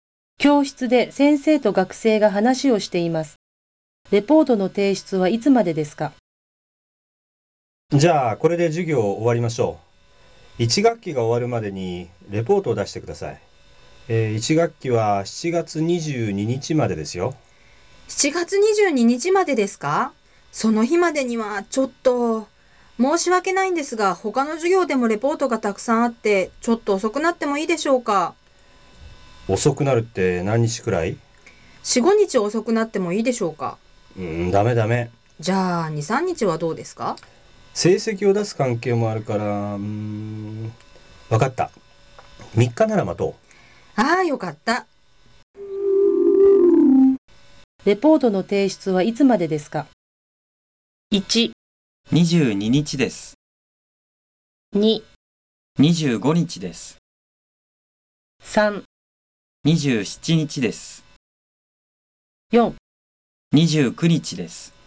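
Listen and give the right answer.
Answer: 2: 25日です。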